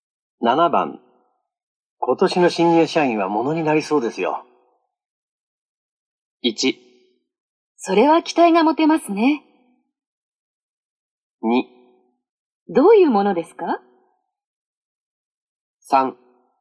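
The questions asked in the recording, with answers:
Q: 今年の新入社員は物になりそうですよ。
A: 1: それは期待が持てますね。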